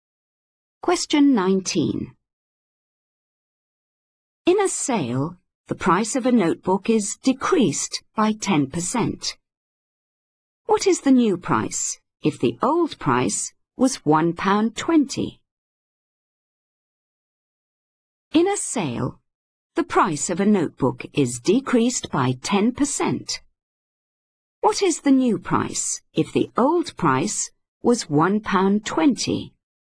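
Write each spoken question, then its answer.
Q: What is the new price if the old price was £1.20?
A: £1.08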